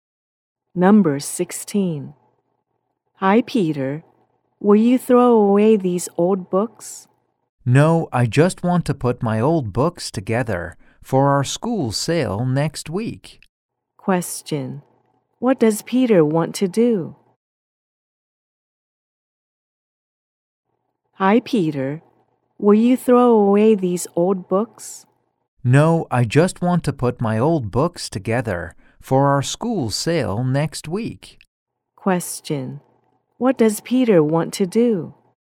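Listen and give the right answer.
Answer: Put his old books together for the school sale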